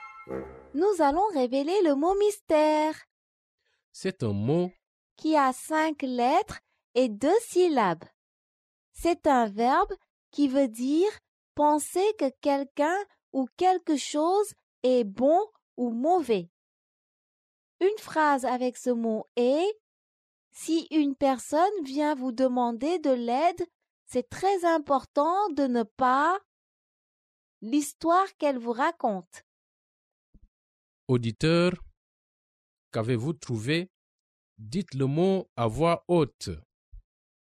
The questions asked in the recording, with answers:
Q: Auditeur, qu'avez-vous trouvé?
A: Le mot mystère est juger.